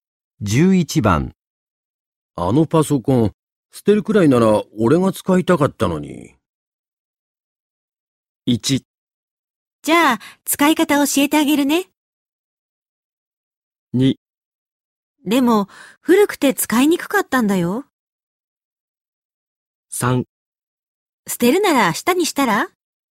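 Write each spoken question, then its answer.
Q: あのパソコン、捨てるくらいなら俺が使いたかったのに。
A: 2: でも、古くて使いにくかったんだよ。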